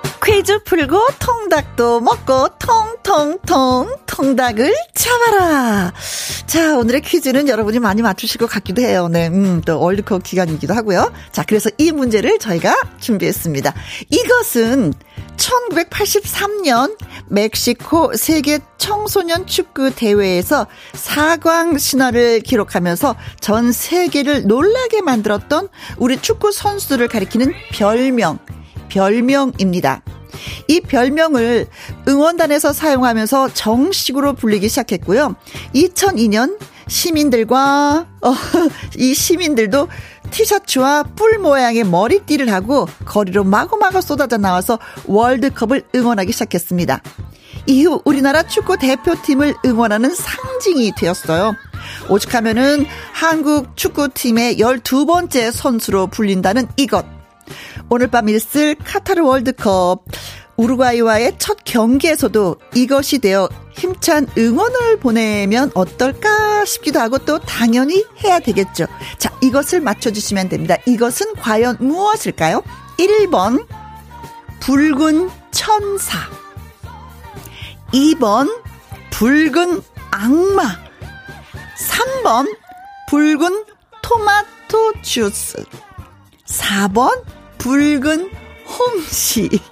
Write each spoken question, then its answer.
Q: 이것은 과연 무엇일까요?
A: 자, 그래서 오늘의 정답은 2번, 붉은 악마입니다.